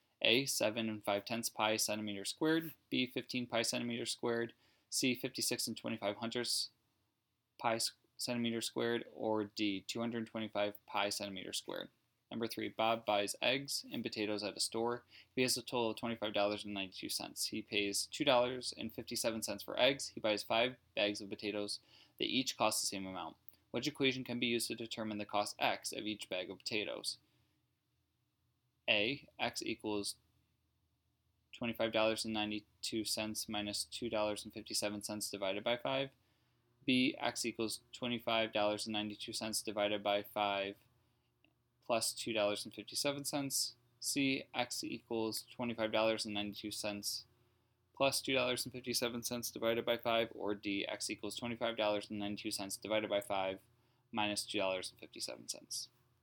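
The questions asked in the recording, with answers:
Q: Which equation can be used to determine the cost x of each bag of potatoes?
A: A: x equals $25.92 minus $2.57 divided by 5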